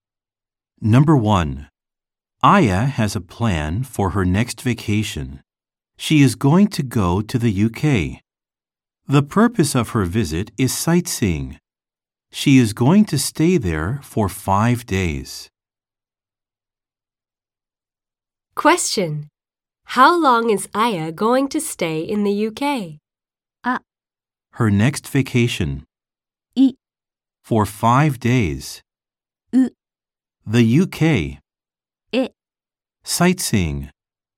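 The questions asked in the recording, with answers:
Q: How long is Aya going to stay in the UK?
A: I: For 5 days.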